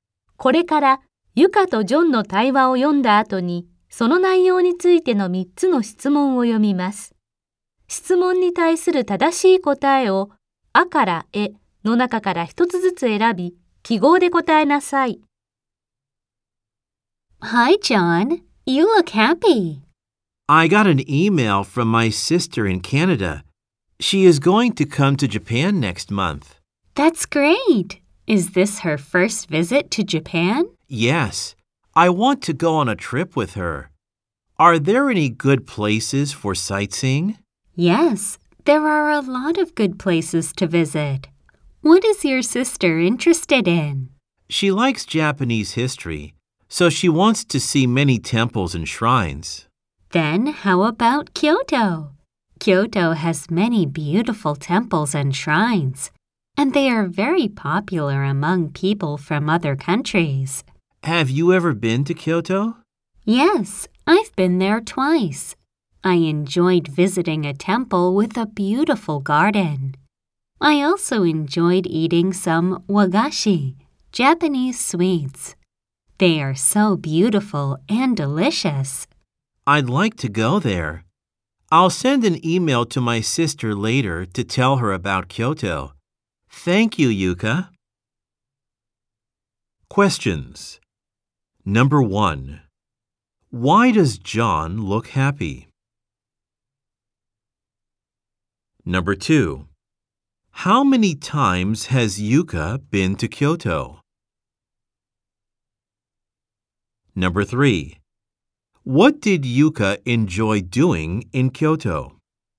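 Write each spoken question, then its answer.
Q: Why does John look happy?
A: He got an email from his sister in Canada saying she will come to Japan next month.

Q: How many times has Yuka been to Kyoto?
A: Twice.

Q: What did Yuka enjoy doing in Kyoto?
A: Visiting a temple with a beautiful garden and eating wagashi (Japanese sweets).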